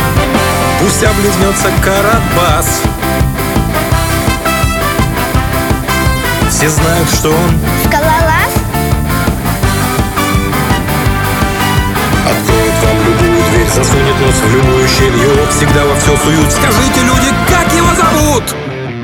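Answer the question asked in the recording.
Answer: Буратино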